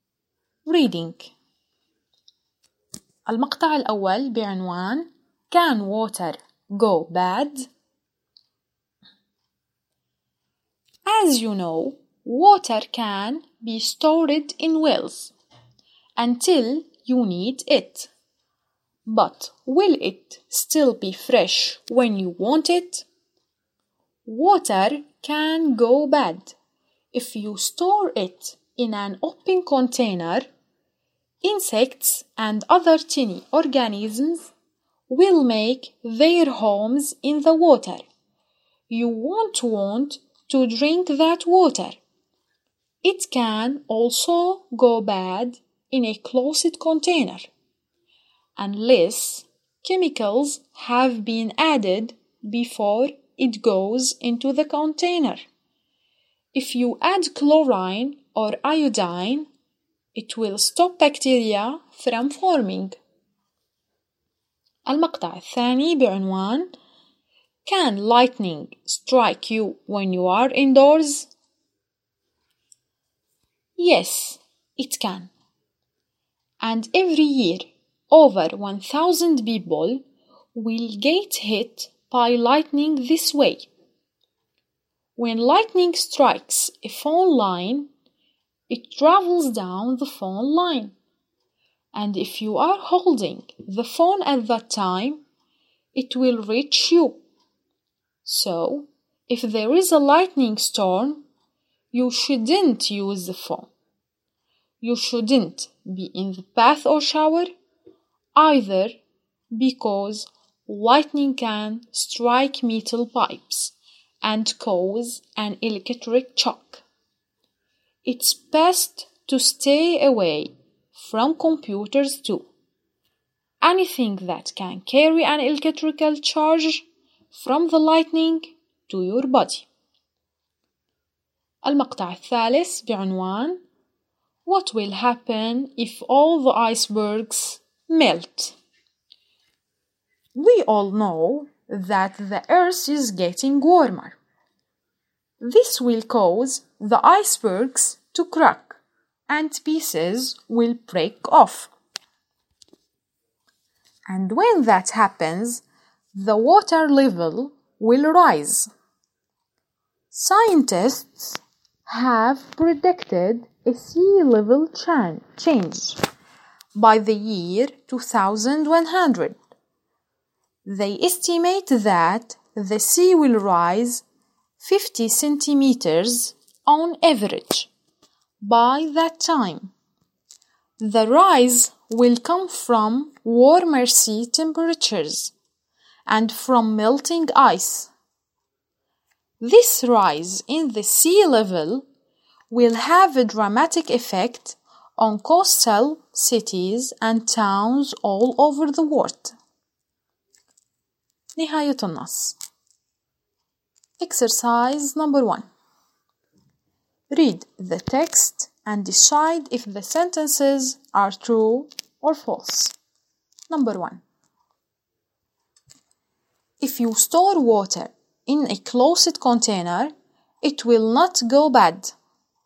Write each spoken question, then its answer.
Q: If you store water in a closed container, it will not go bad.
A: False.